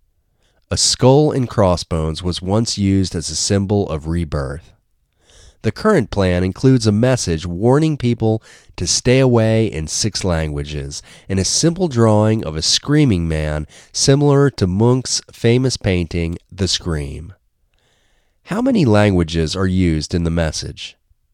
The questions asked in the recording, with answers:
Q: How many languages are used in the message?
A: The message uses six languages.